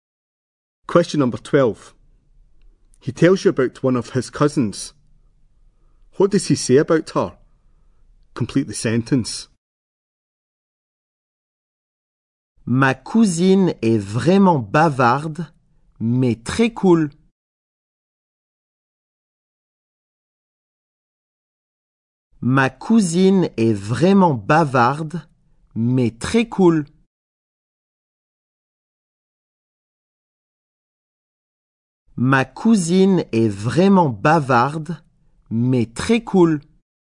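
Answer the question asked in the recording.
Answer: She is really chatty but very cool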